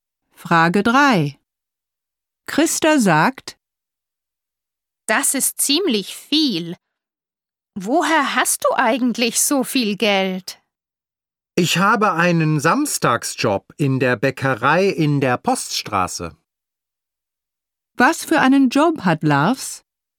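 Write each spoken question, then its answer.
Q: Was für einen Job hat Lars?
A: Einen Samstagsjob in der Bäckerei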